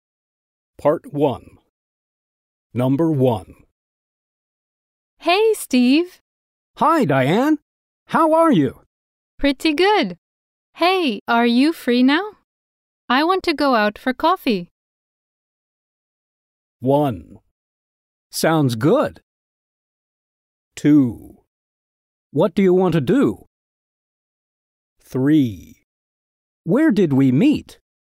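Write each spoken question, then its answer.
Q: I want to go out for coffee.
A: 1: Sounds good!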